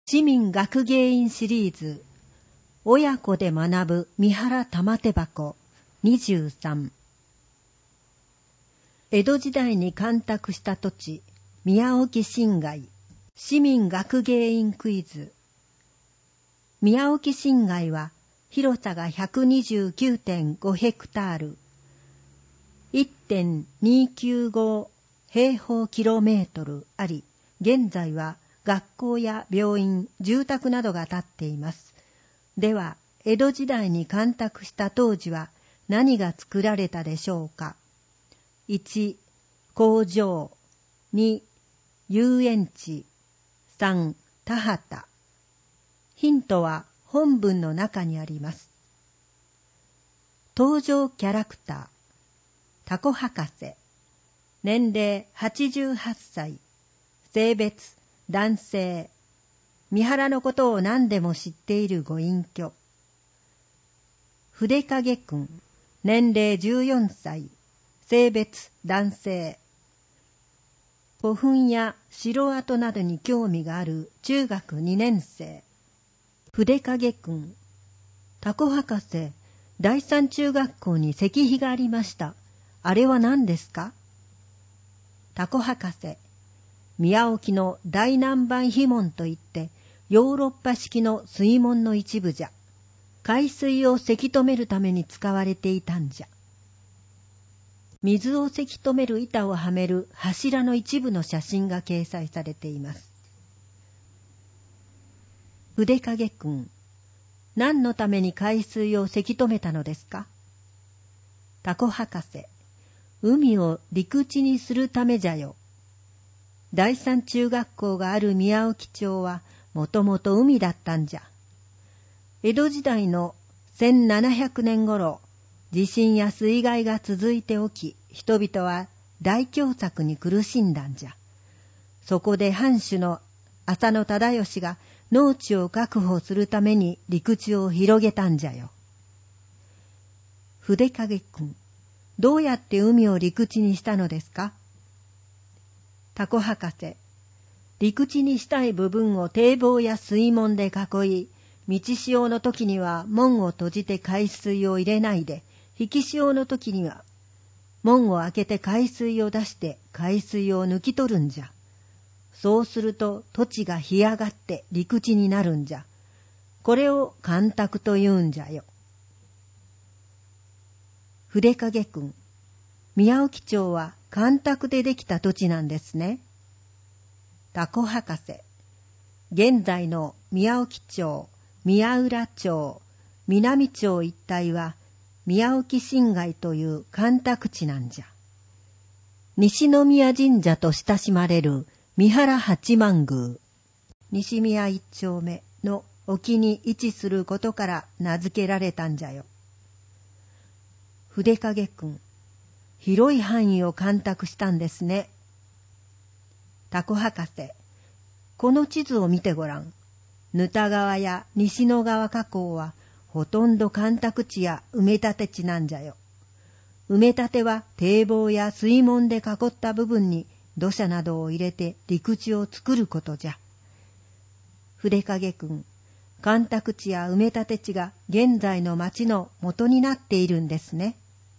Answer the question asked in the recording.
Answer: 3番、田畑。